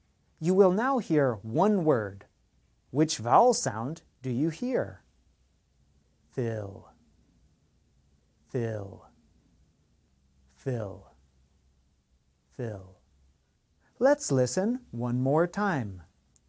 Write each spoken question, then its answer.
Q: Which vowel sound do you hear?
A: The answer is I, fill.